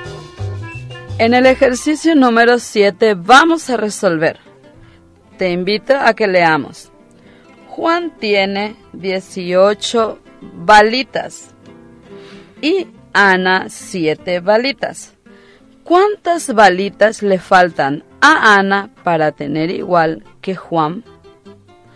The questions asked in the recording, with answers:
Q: ¿Cuántas balitas le faltan a Ana para tener igual que Juan?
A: Ya tenemos el resultado, que es el número 11.